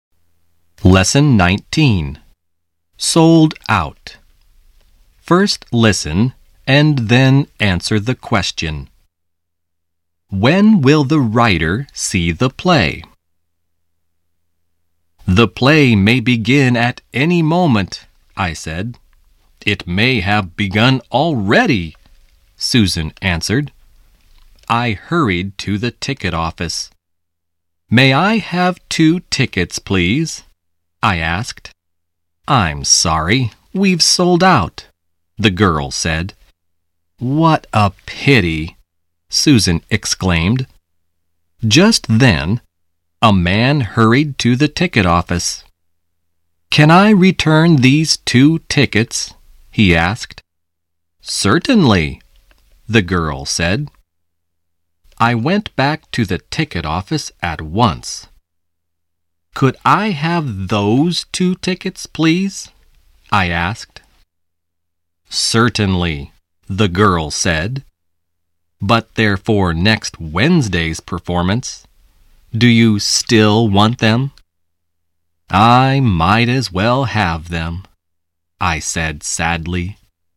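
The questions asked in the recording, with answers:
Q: When will the writer see the play?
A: Next Wednesday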